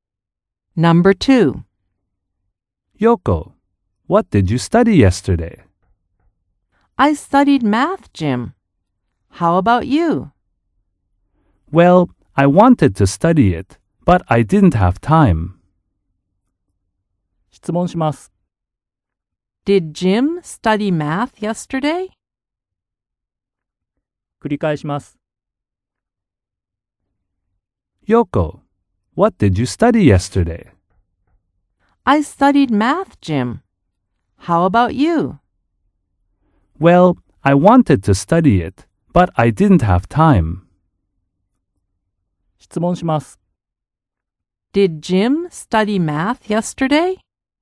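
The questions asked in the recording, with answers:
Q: Did Jim study math yesterday?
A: No, he didn't.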